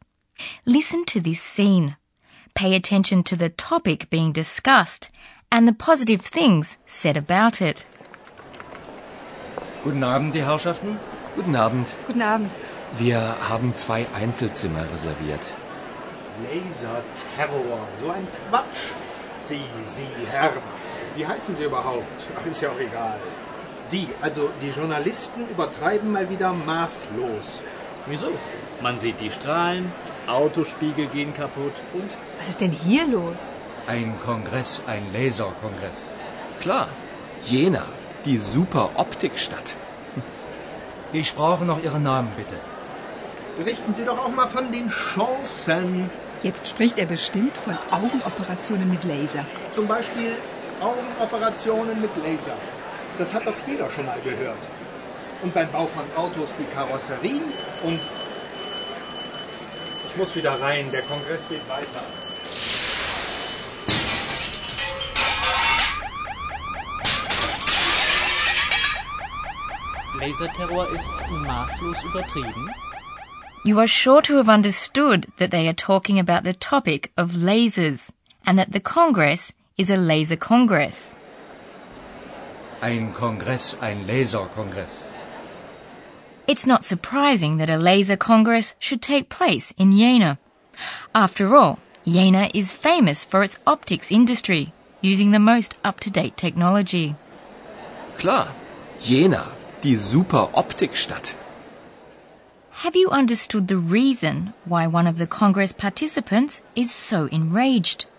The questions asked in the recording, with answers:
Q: Have you understood the reason why one of the Congress participants is so enraged?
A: He is of the opinion that they grossly, maßlos, exaggerate everything.